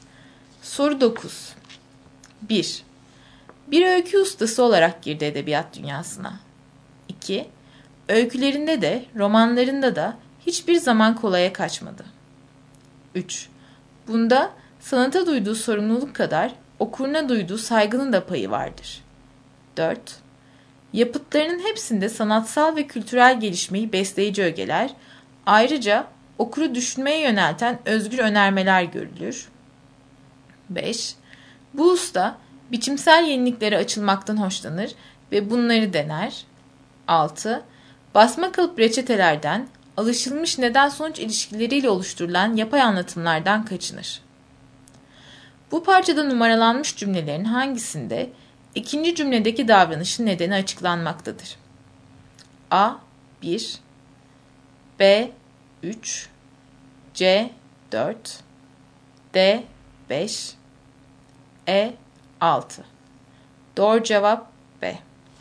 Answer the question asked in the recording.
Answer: Doğru cevap B.